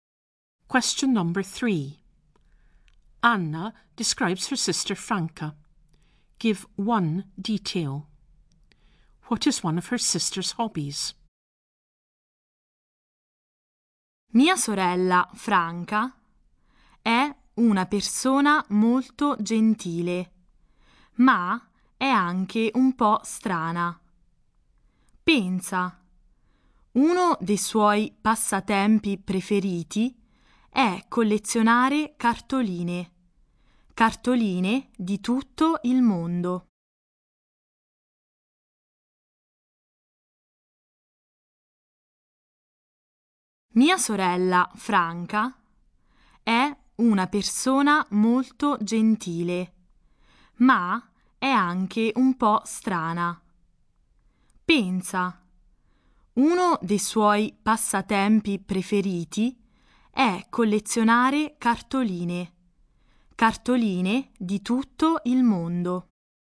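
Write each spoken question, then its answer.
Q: What is one of her sister's hobbies?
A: Collecting postcards from all over the world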